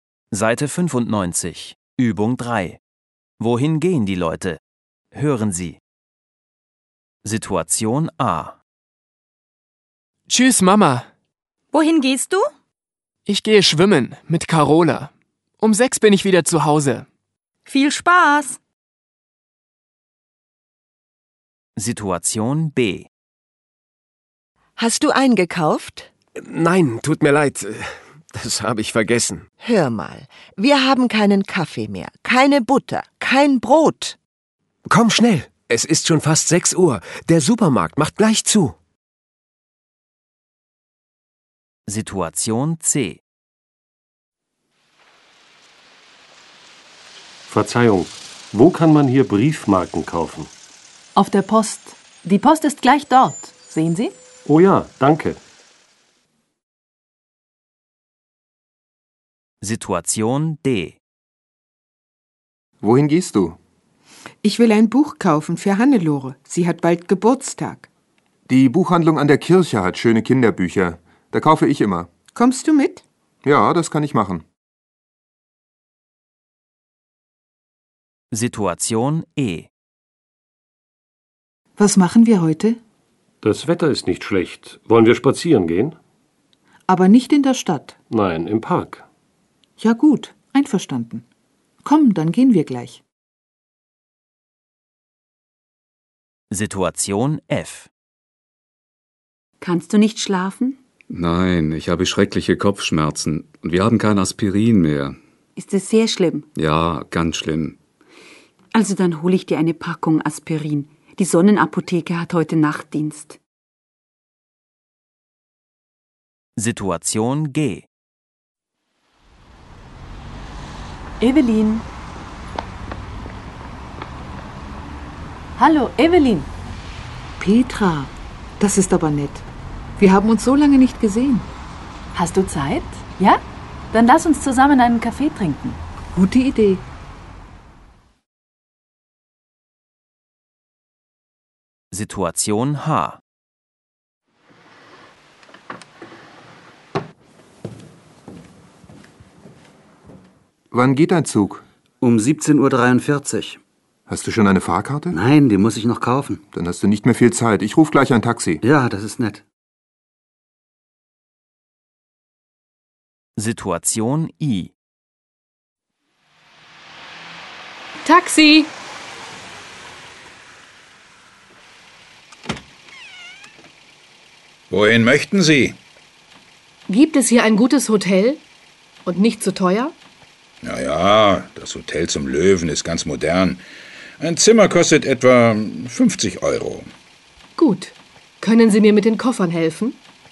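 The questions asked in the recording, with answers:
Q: Wohin gehen die Leute?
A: Schwimmen (ins Schwimmbad)

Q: Wohin gehen die Leute?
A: In den Supermarkt

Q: Wohin gehen die Leute?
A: Zur Post

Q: Wohin gehen die Leute?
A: In die Buchhandlung

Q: Wohin gehen die Leute?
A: In den Park

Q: Wohin gehen die Leute?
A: In die Apotheke

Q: Wohin gehen die Leute?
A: Ins Hotel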